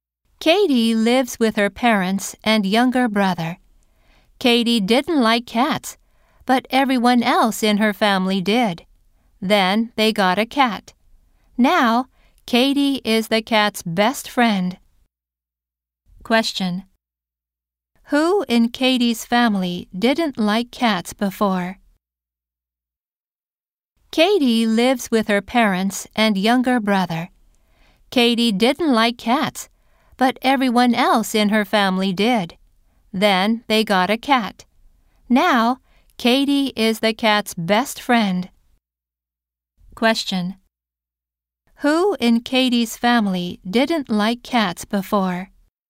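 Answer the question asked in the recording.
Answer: Katie.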